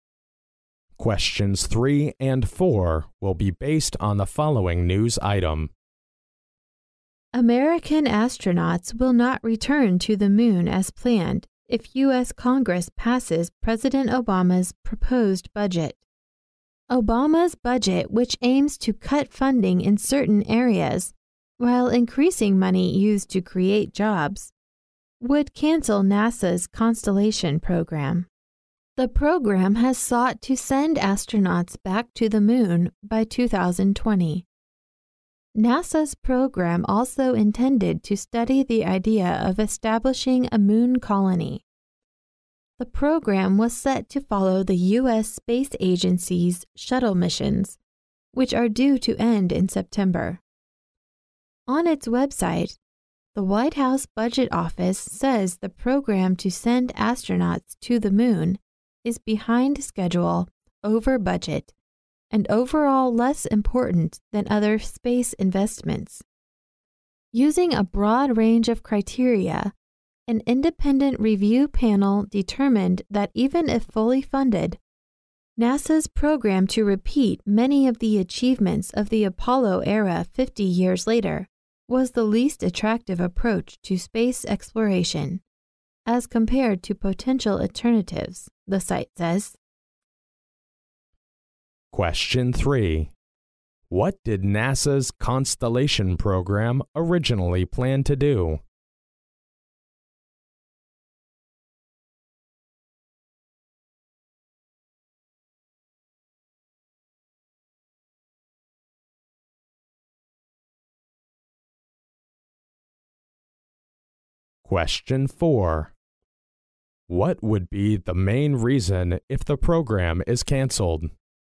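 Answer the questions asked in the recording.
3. Send astronauts back to the moon by 2020 and study setting up a moon colony
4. It is behind schedule, over budget and less important than other space investments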